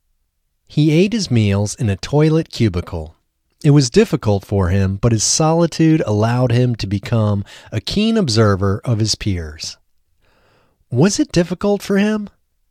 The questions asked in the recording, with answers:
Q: Was it difficult for him?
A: Yes, it was difficult for him.